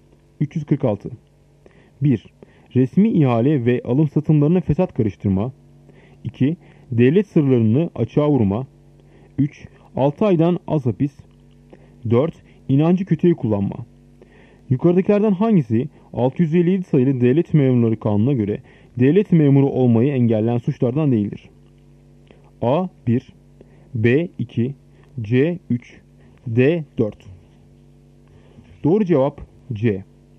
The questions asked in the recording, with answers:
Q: Yukarıdakilerden hangisi 657 sayılı devlet memurları kanununa göre devlet memuru olmayı engelleyen suçlardan değildir?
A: Doğru cevap C. 3.